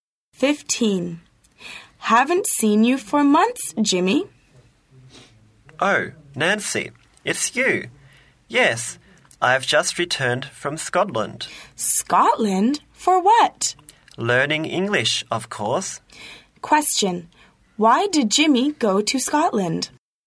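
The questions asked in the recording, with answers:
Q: Why did Jimmy go to Scotland?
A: To learn English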